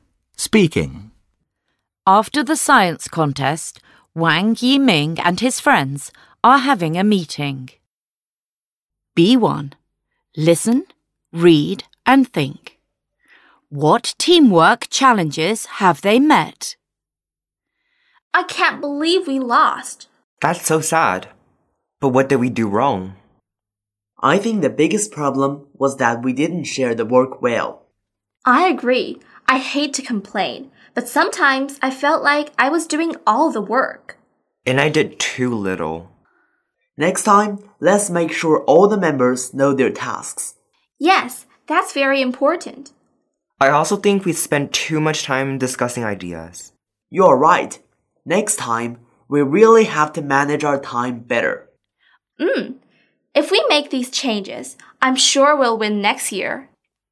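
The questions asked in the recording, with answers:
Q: What teamwork challenges have they met?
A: They didn't share the work well, and they spent too much time discussing ideas (poor time management).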